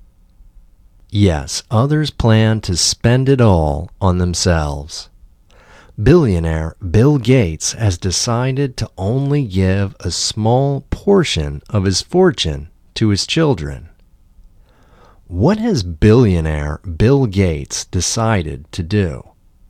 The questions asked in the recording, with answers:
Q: What has billionaire Bill Gates decided to do?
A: Billionaire Bill Gates has decided to only give a small portion of his fortune to his children.